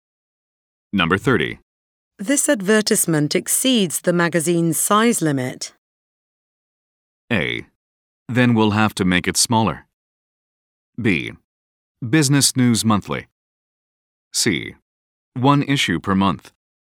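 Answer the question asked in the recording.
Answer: A: Then we'll have to make it smaller.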